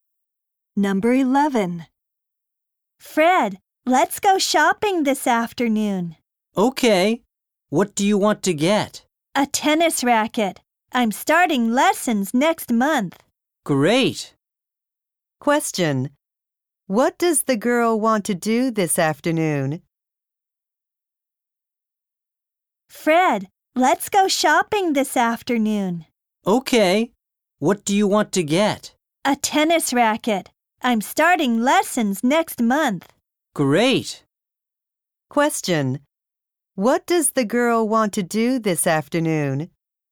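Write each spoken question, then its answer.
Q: What does the girl want to do this afternoon?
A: Go shopping (for a tennis racket)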